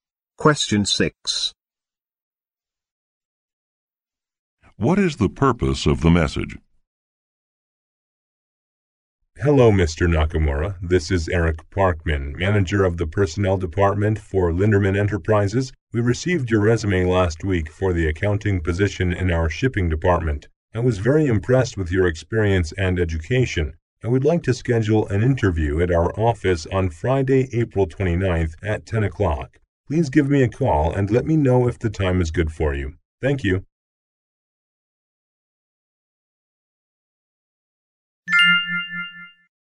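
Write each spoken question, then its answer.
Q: What is the purpose of the message?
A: To schedule a job interview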